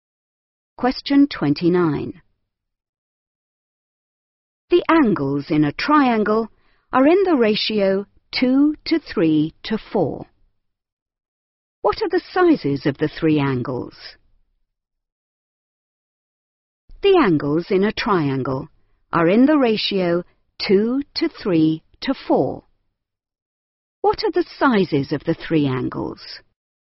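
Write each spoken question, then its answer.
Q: What are the sizes of the three angles?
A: 40°, 60°, 80°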